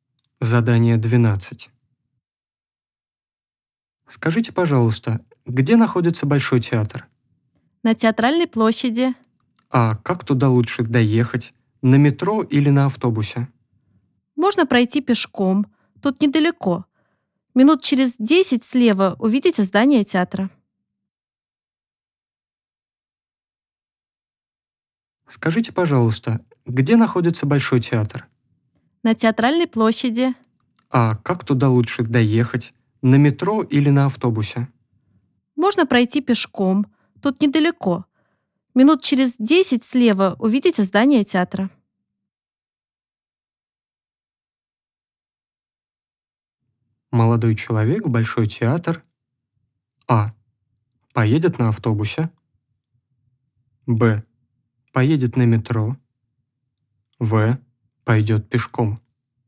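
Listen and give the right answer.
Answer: В: Пойдет пешком.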